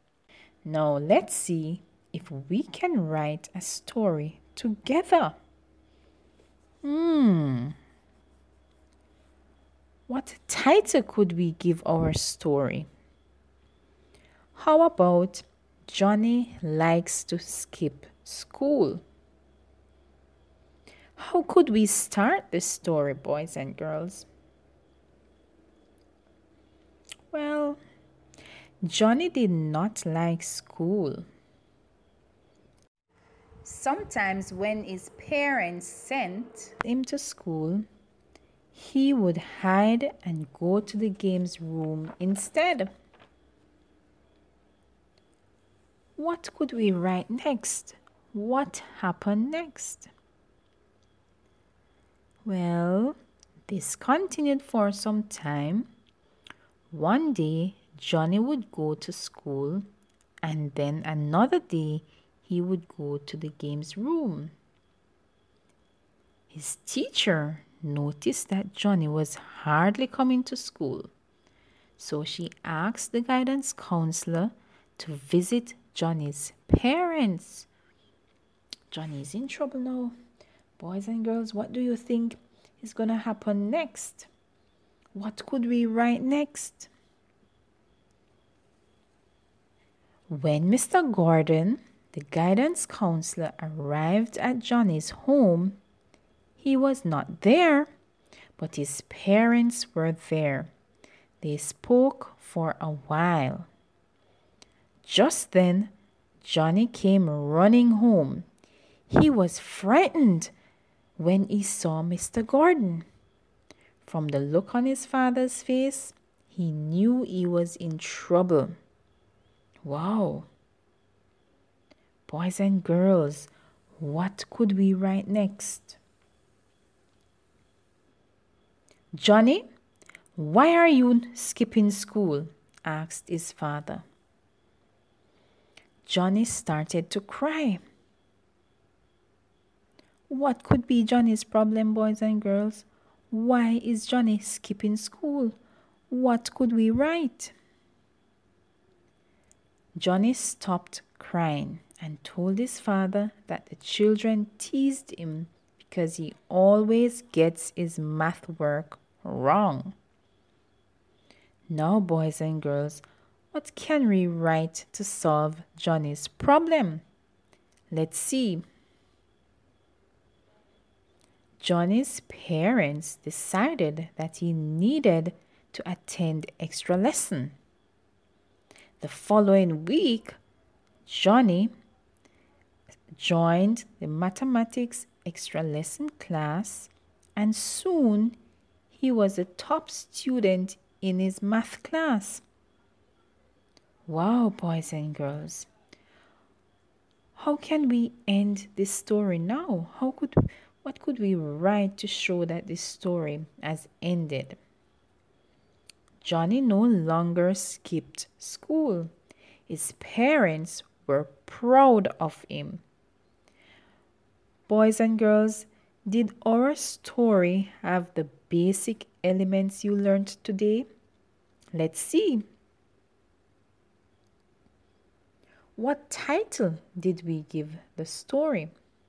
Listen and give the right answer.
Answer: If you said Johnny likes to skip school, you are correct, boys and girls.